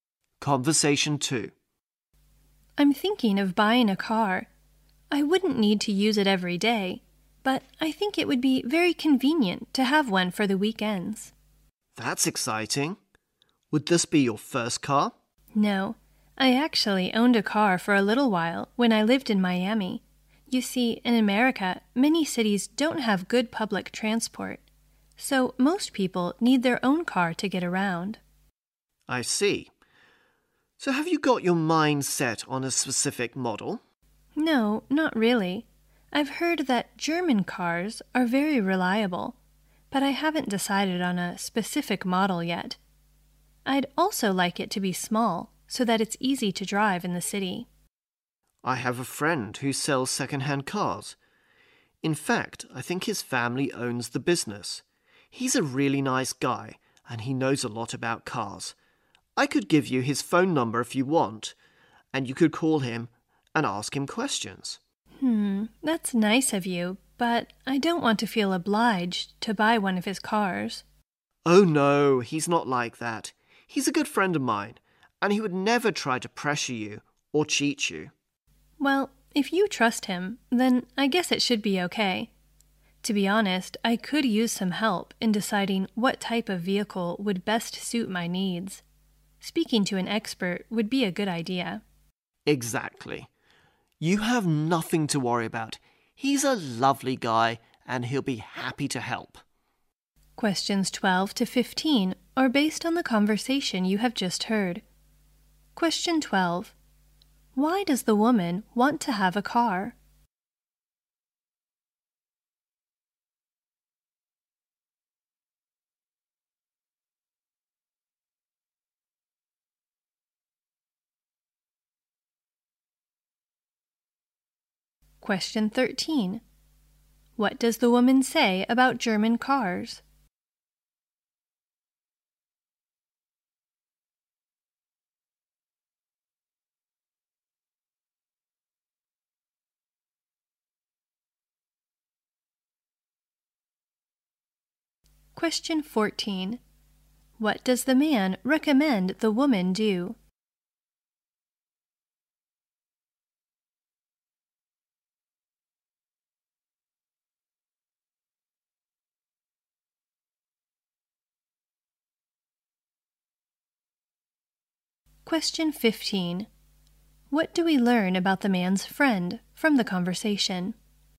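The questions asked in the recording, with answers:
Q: Why does the woman want to have a car?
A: It would be convenient for the weekends

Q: What does the woman say about German cars?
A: She has heard they are very reliable

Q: What does the man recommend the woman do?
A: Call his friend who sells second-hand cars for advice

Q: What do we learn about the man's friend from the conversation?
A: He is trustworthy and knows a lot about cars; he would never pressure or cheat her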